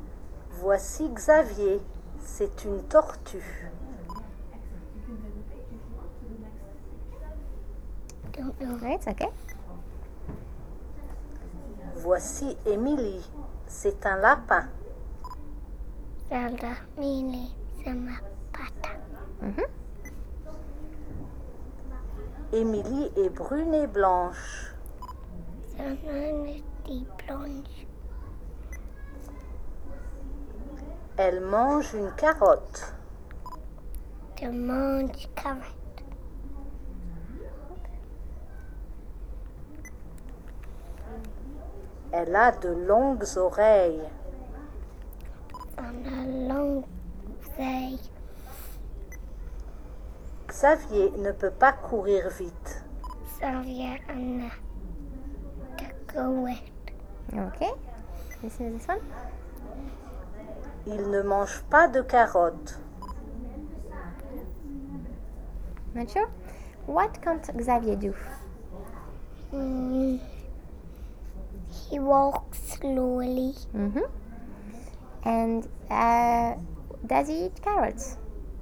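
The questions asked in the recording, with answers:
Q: What can't Xavier do?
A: Run fast

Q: And does he eat carrots?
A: No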